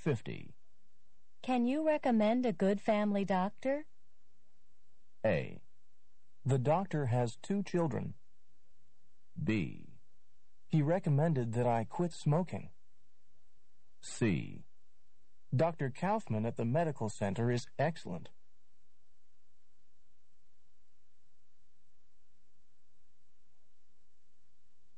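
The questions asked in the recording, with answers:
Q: Can you recommend a good family doctor?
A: C: Dr. Kaufman at the medical center is excellent.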